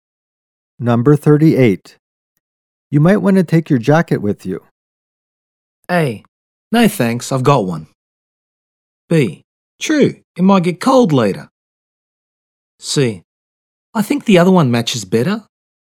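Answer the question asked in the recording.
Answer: B: True, it might get cold later.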